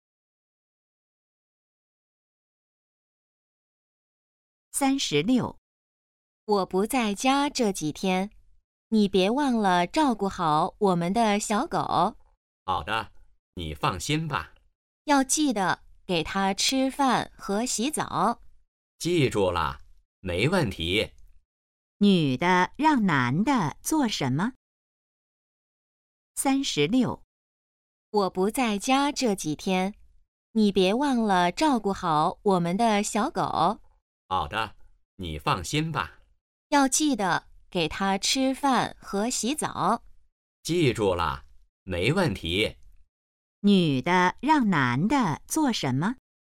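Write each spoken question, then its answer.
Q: 女的让男的做什么?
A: 照顾小狗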